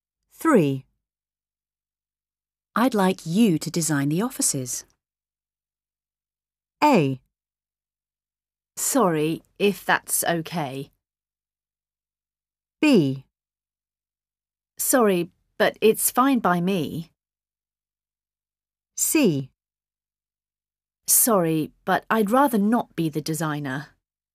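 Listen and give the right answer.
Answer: C: Sorry, but I'd rather not be the designer.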